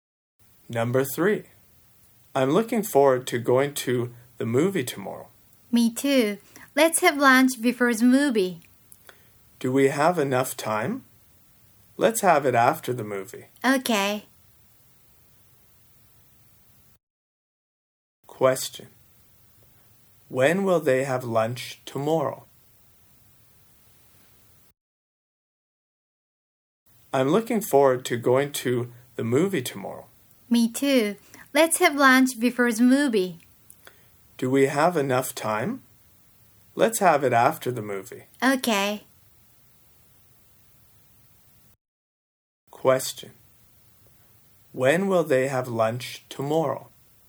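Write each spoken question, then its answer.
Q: When will they have lunch tomorrow?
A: After the movie.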